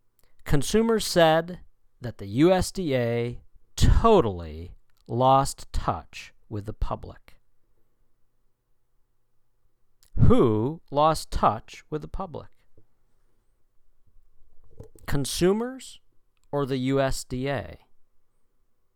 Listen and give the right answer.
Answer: The USDA. The USDA totally lost touch with the public.